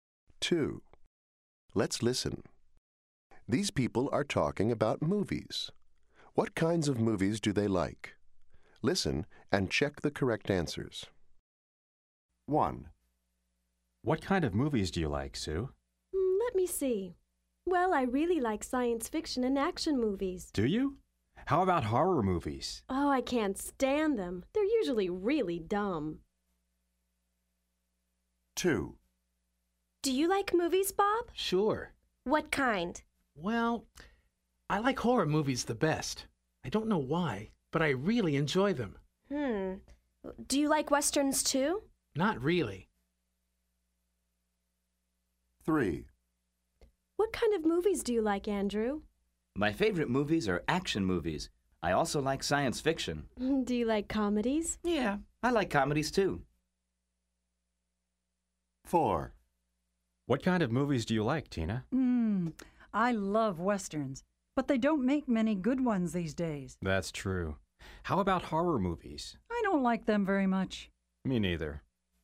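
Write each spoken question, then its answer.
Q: What kinds of movies do they like?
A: Sue likes science fiction and action movies

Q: What kinds of movies do they like?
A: Bob likes horror movies

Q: What kinds of movies do they like?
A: Andrew likes action movies, science fiction and comedies

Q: What kinds of movies do they like?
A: Tina likes westerns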